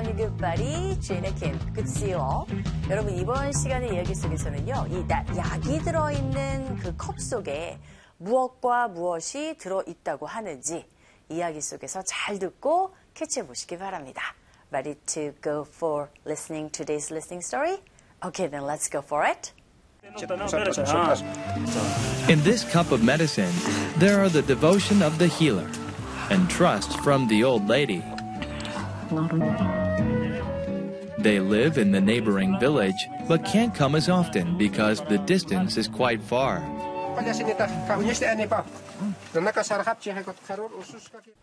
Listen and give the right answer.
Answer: Healer, 즉 칼라와의 그 devotion, 헌신과 그리고 노부인의 모여 신뢰가 들어있다고 했어요.